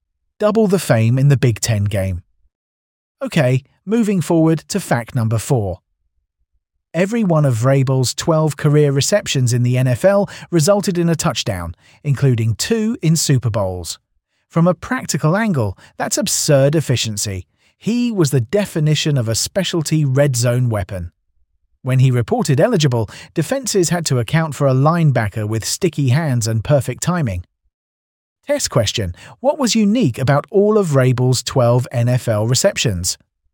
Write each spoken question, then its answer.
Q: What was unique about all of Vrabel's 12 NFL receptions?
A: Correct answer. All were touchdowns.